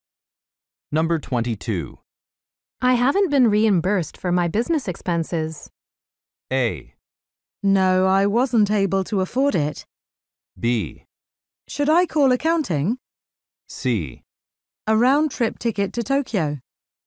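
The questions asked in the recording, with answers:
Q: I haven't been reimbursed for my business expenses.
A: B: Should I call accounting?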